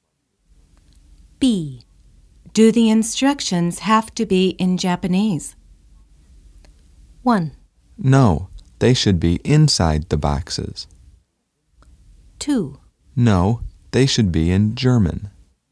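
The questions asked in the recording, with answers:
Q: Do the instructions have to be in Japanese?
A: 2: No, they should be in German.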